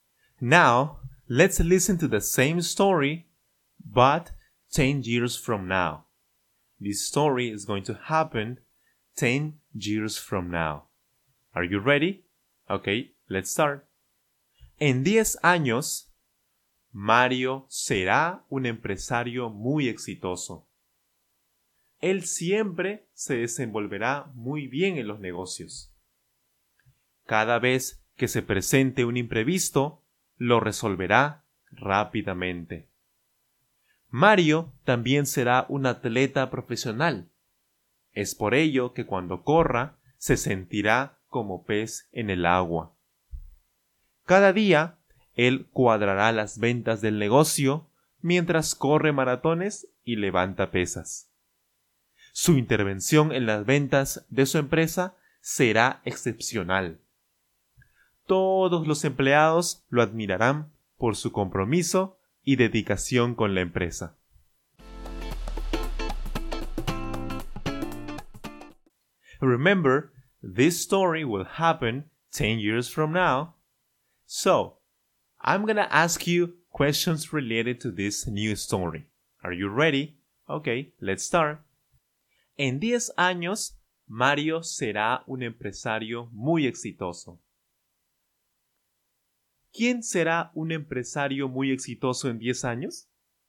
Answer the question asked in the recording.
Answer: Mario, por supuesto, Mario.